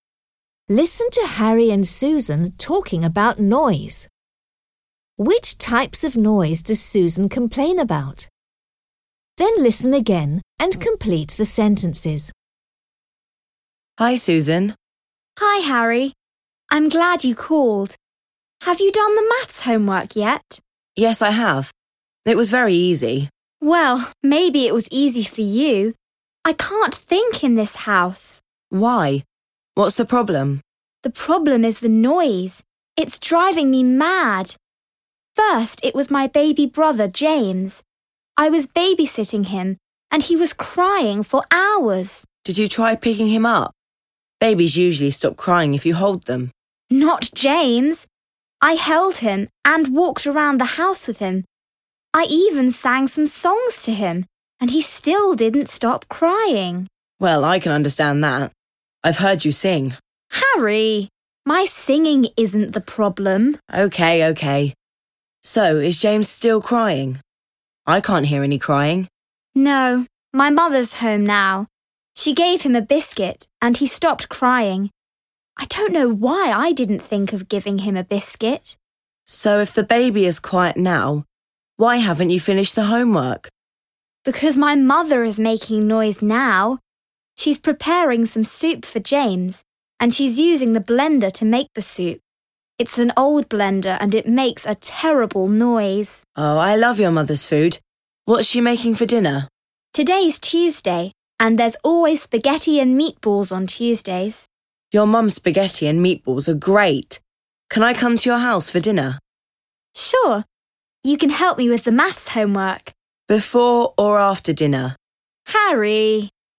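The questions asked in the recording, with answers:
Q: Which types of noise does Susan complain about?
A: Her baby brother James crying and her mother's noisy old blender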